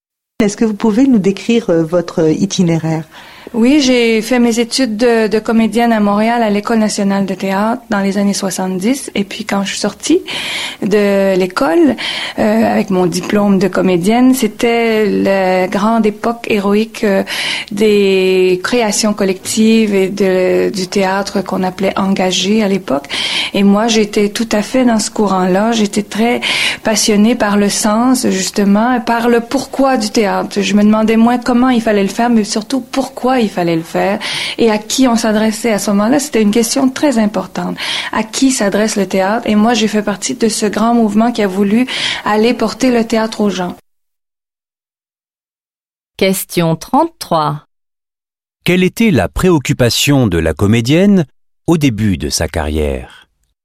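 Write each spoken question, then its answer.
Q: Quelle était la préoccupation de la comédienne au début de sa carrière?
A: Le sens du théâtre : pourquoi le faire et à qui il s'adresse (porter le théâtre aux gens)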